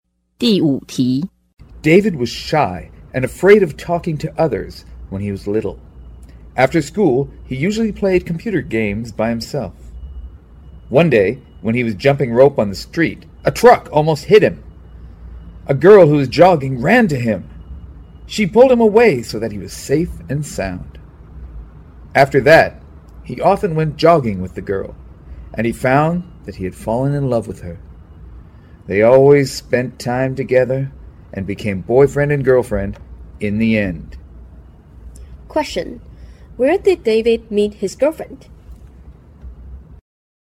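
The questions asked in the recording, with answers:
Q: Where did David meet his girlfriend?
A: On the street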